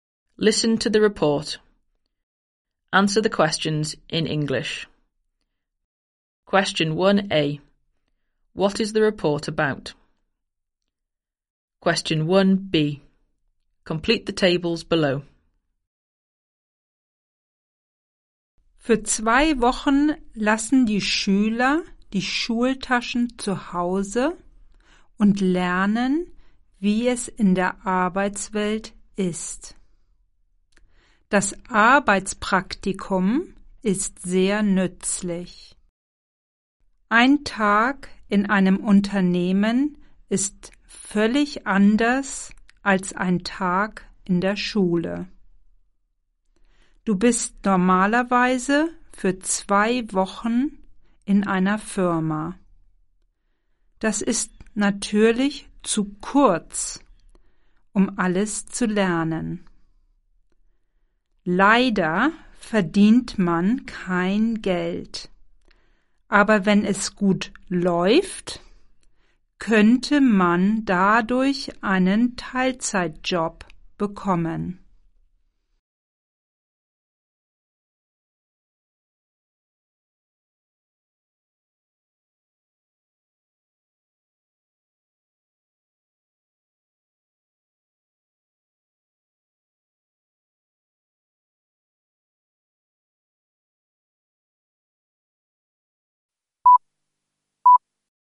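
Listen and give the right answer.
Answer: Work experience (students spend two weeks in a company)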